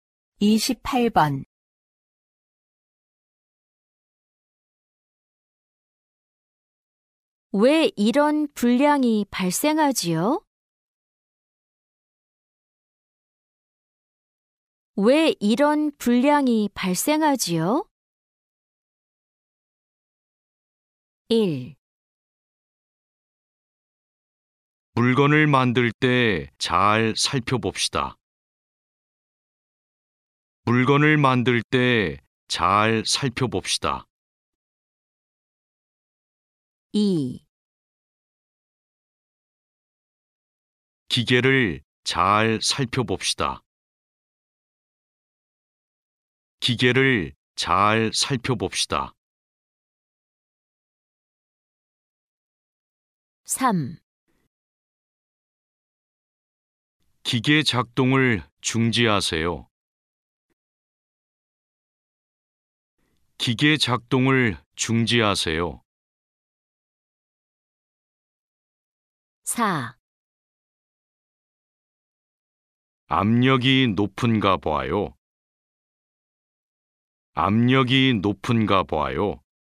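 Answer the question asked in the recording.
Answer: 4: 압력이 높은가 봐요.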